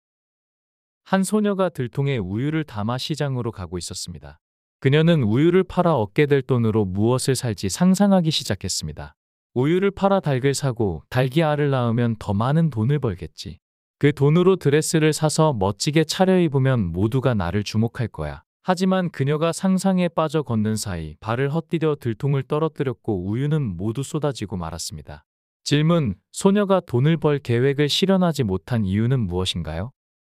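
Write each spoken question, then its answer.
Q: 소녀가 돈을 벌 계획을 실현하지 못한 이유는 무엇인가요?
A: 상상에 빠져 걷다가 발을 헛디뎌 들통을 떨어뜨려 우유가 모두 쏟아졌기 때문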